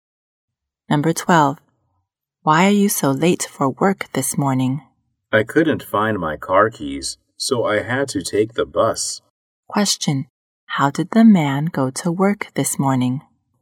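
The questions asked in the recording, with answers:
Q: Question. How did the man go to work this morning?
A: By bus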